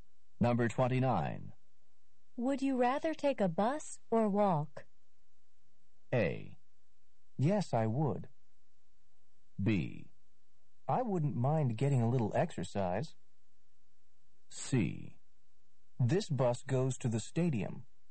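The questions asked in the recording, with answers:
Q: Would you rather take a bus or walk?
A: B: I wouldn't mind getting a little exercise.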